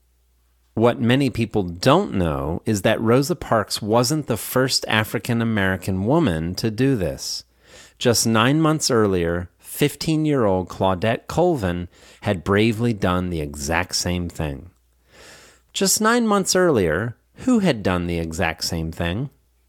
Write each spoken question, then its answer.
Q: Just 9 months earlier, who had done the exact same thing?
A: Just 9 months earlier, 15-year-old Claudette Colvin had bravely done the exact same thing.